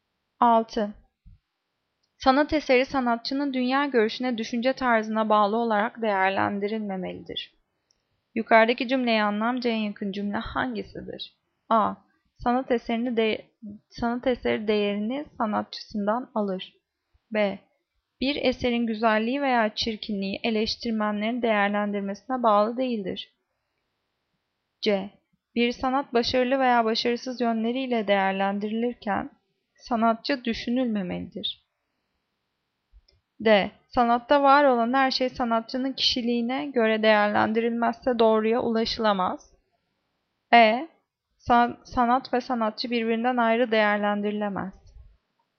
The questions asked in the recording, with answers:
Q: Yukarıdaki cümleye anlamca en yakın cümle hangisidir?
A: Cevap C. Bir sanat başarılı veya başarısız yönleriyle değerlendirilirken sanatçı düşünülmemelidir.